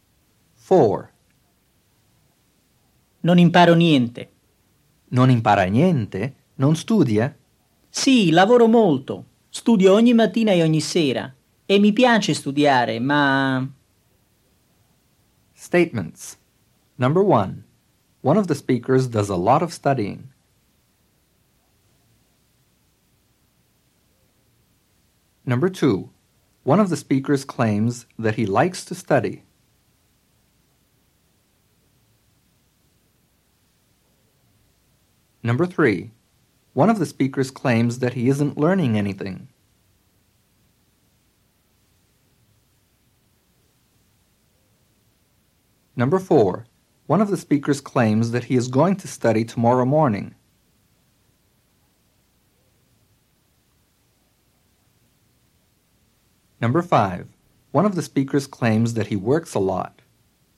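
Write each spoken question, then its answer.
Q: One of the speakers does a lot of studying.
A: True

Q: One of the speakers claims that he likes to study.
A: True

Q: One of the speakers claims that he isn't learning anything.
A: True

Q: One of the speakers claims that he is going to study tomorrow morning.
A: False

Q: One of the speakers claims that he works a lot.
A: True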